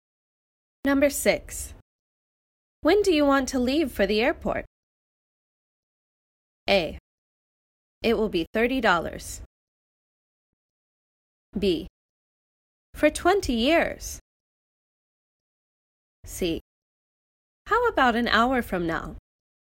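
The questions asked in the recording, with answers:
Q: When do you want to leave for the airport?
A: C: How about an hour from now?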